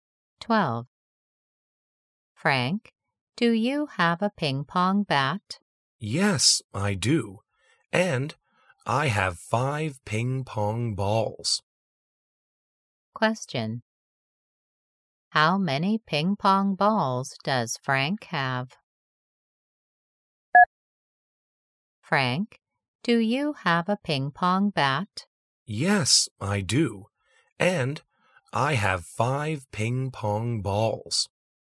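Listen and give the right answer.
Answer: Five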